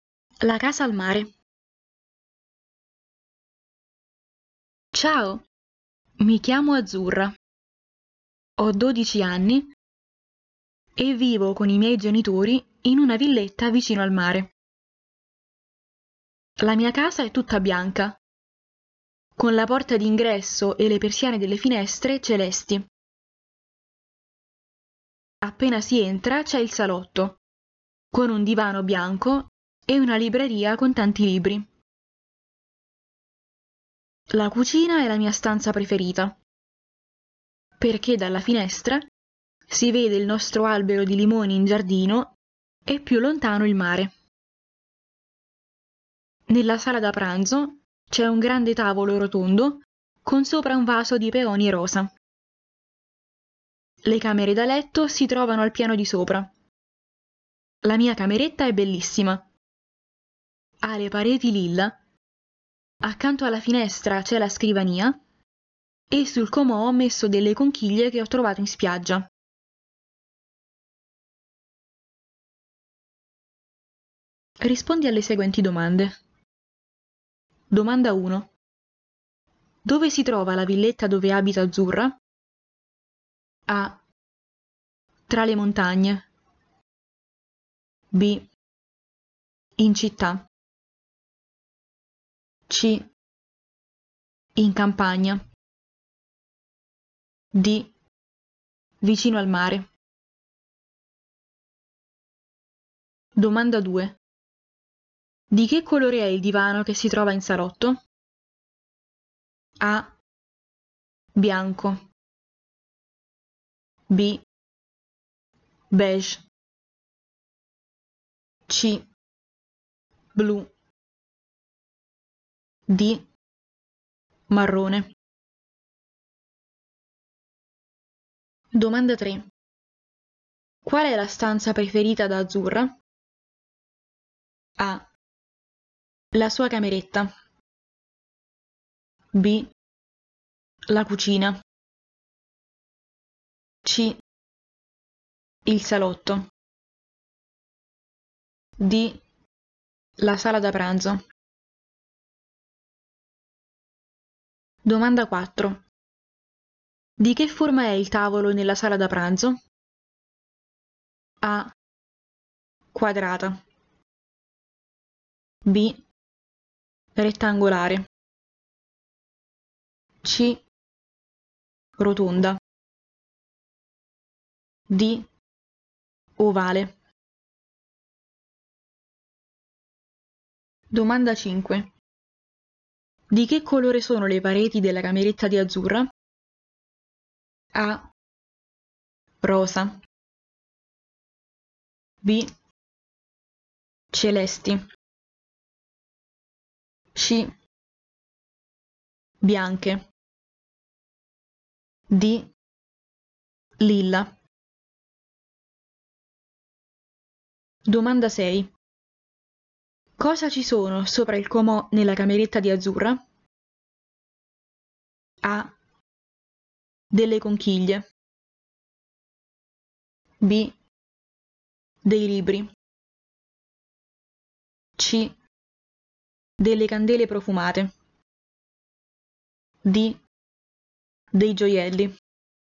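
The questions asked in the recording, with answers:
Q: Dove si trova la villetta dove abita Azzurra?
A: D: Vicino al mare.

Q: Di che colore è il divano che si trova in salotto?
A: A: Bianco.

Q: Qual è la stanza preferita da Azzurra?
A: B: La cucina.

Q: Di che forma è il tavolo nella sala da pranzo?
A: C: Rotonda.

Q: Di che colore sono le pareti della cameretta di Azzurra?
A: D: Lilla.

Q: Cosa ci sono sopra il comò nella cameretta di Azzurra?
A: A: Delle conchiglie.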